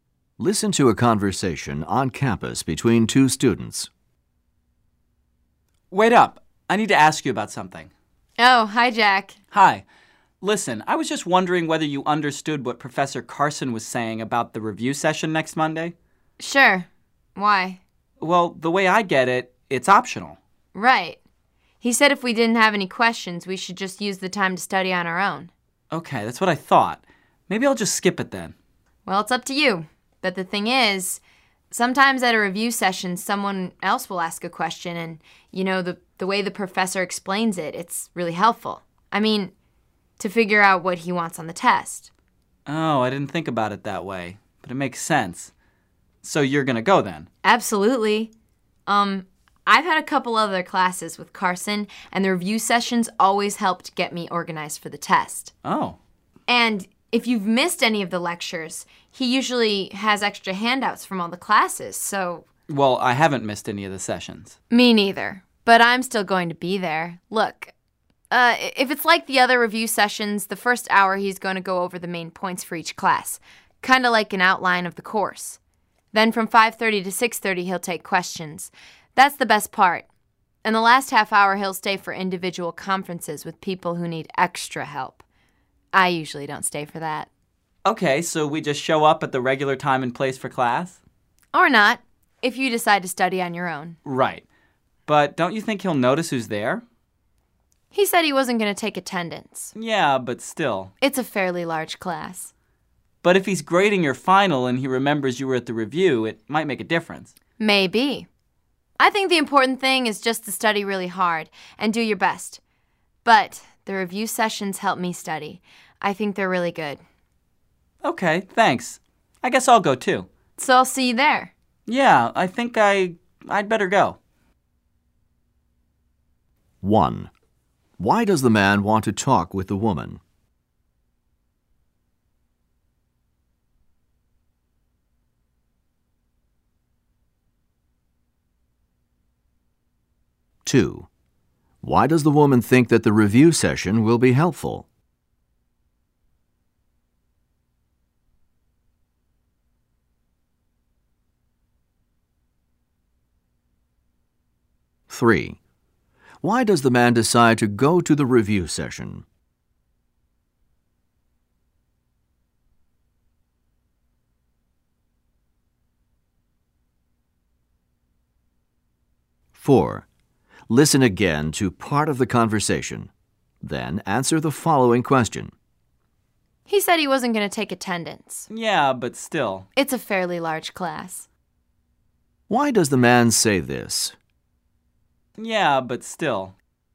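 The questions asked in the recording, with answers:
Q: Why does the man want to talk with the woman?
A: To ask what Professor Carson said about the review session

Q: Why does the woman think that the review session will be helpful?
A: The professor's answers to other students' questions show what he wants on the test

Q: Why does the man say this?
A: He thinks the professor may still notice who attends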